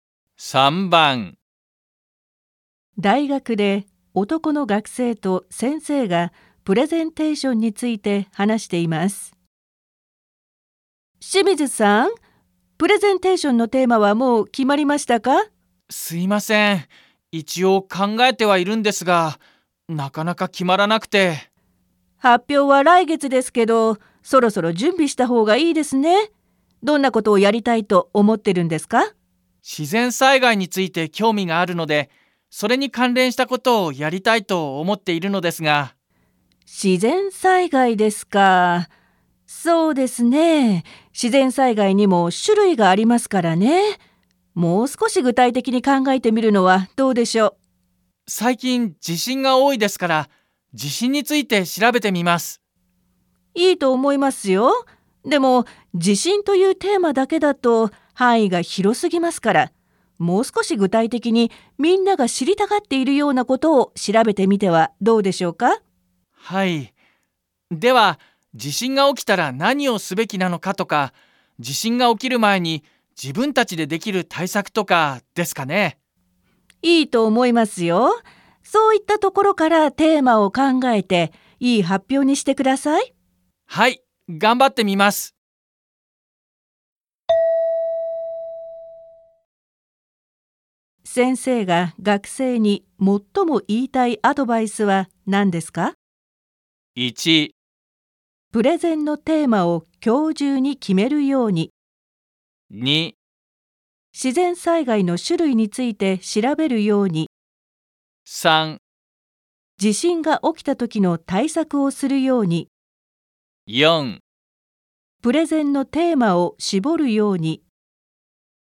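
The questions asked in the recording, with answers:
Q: 先生が学生に最も言いたいアドバイスは何ですか?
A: 4: プレゼンのテーマを絞るように。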